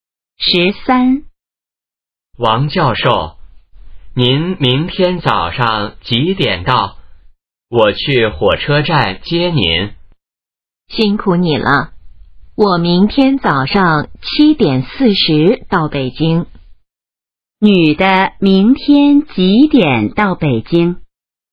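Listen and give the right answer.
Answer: 早上7:40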